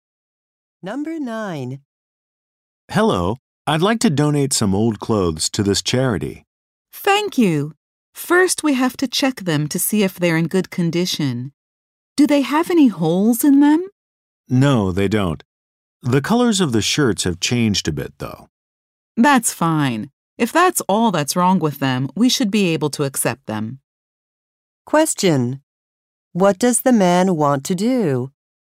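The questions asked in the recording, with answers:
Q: What does the man want to do?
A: Donate old clothes to charity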